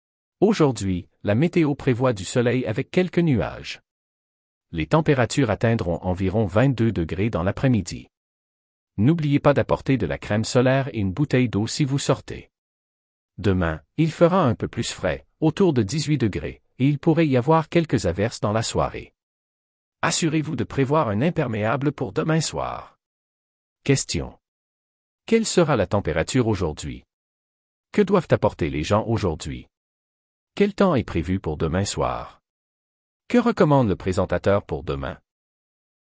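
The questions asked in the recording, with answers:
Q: Quelle sera la température aujourd'hui?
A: Environ 22 degrés

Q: Que doivent apporter les gens aujourd'hui?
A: De la crème solaire et une bouteille d'eau

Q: Quel temps est prévu pour demain soir?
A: Quelques averses, plus frais (environ 18 degrés)

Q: Que recommande le présentateur pour demain?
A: Prévoir un imperméable

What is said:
Weather Reporter: Bonjour à tous! Aujourd'hui, la météo prévoit du soleil avec quelques nuages. Les températures atteindront environ 22 degrés dans l'après-midi. N'oubliez pas d'apporter de la crème solaire et une bouteille d'eau si vous sortez. Demain, il fera un peu plus frais, autour de 18 degrés, et il pourrait y avoir quelques averses dans la soirée. Assurez-vous de prévoir un imperméable pour demain soir! Questions: Quelle sera la température aujourd'hui?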